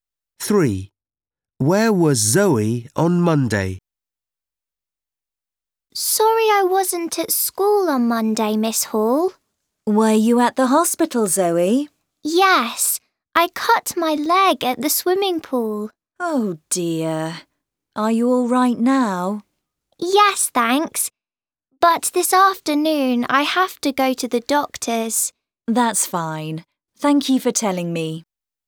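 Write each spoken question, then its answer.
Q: Where was Zoe on Monday?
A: At the hospital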